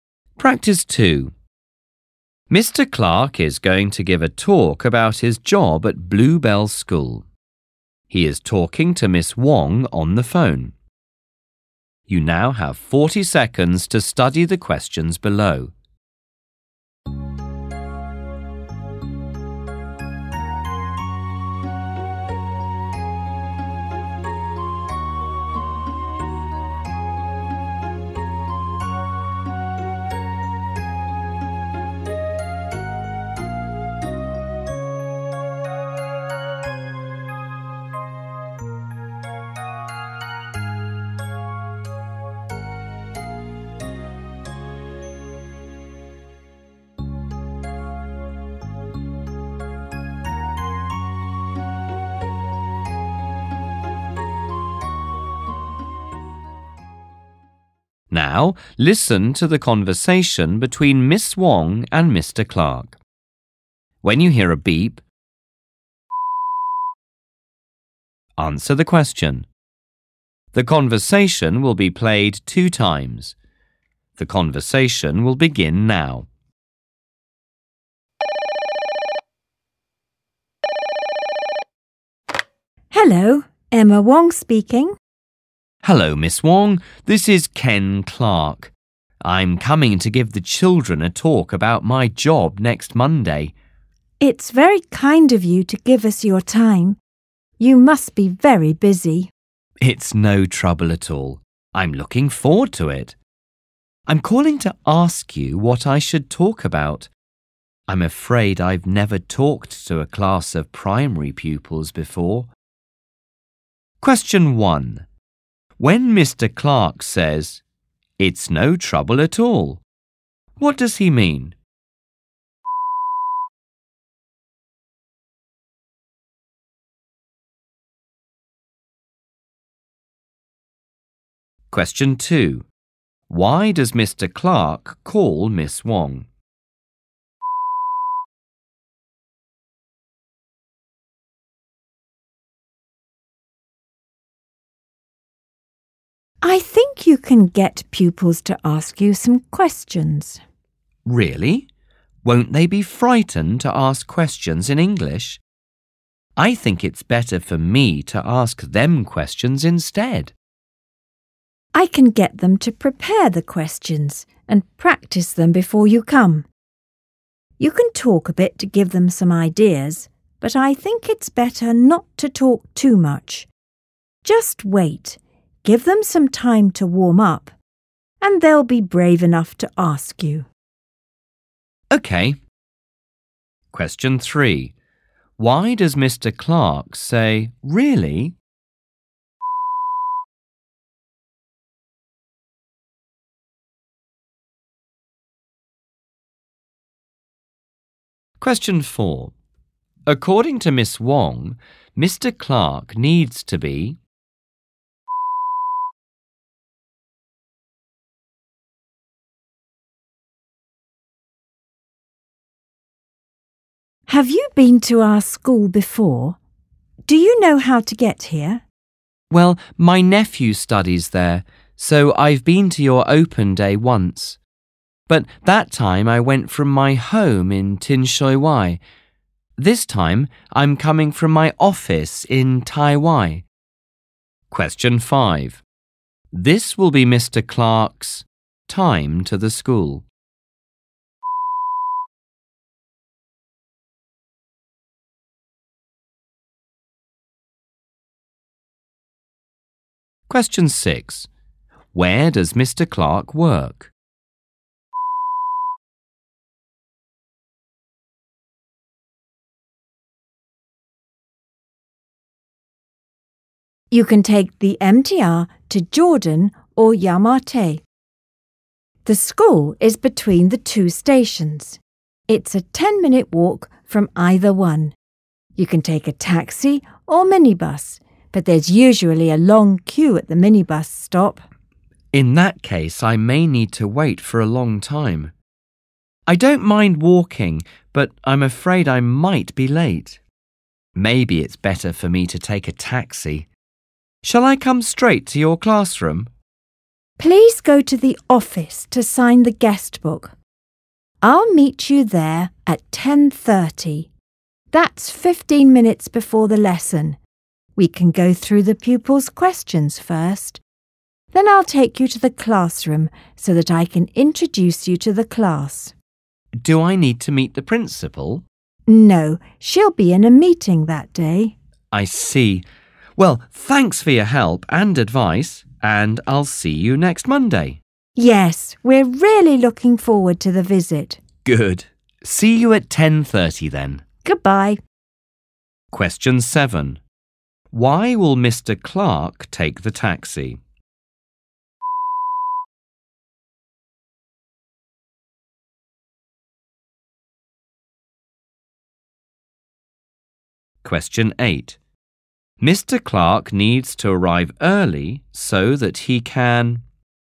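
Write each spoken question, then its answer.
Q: When Mr. Clark says, "It's no trouble at all," what does he mean?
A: He is happy to give the talk and doesn't mind

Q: Why does Mr. Clark call Miss Wong?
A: To ask what he should talk about

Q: Why does Mr. Clark say, "Really?"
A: He is surprised and worried the pupils will be afraid to ask questions in English

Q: Where does Mr. Clark work?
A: In Tai Wai

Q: Why will Mr. Clark take the taxi?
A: He is afraid he might be late because of the long minibus queue

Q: Mr. Clark needs to arrive early so that he can...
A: go through the pupils' questions first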